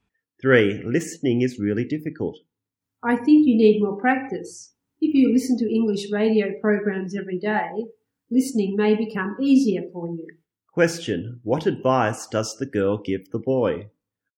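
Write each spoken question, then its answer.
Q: Question, what advice does the girl give the boy?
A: Listen to English radio programs every day.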